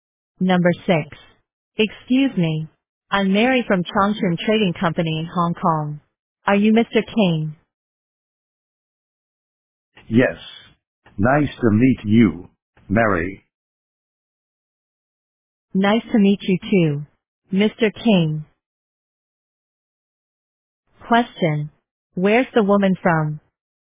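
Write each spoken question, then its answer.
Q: Where's the woman from?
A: Hong Kong (a trading company in Hong Kong)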